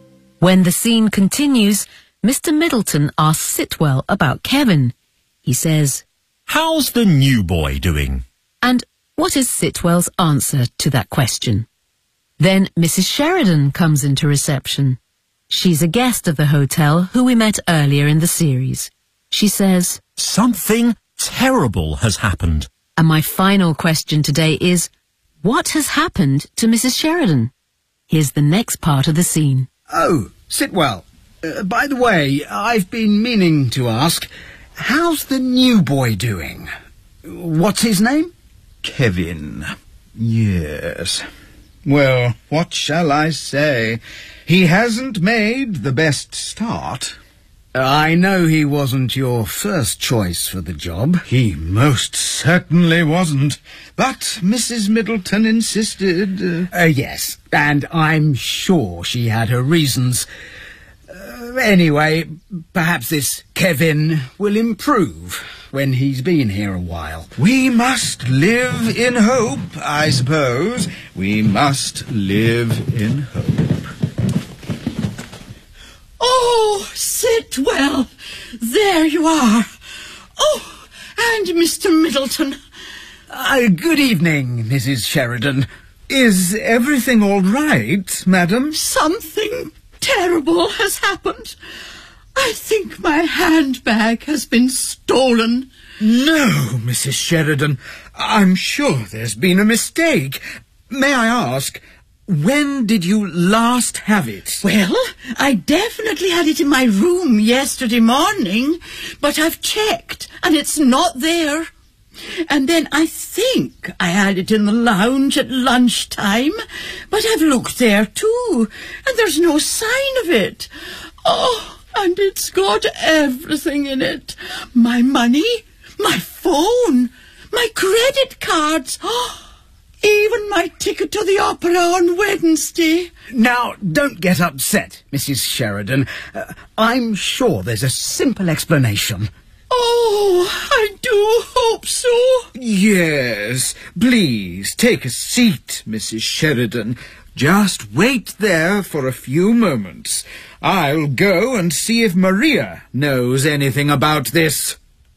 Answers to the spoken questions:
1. he hasn't made the best start.
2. I think my handbag has been stolen.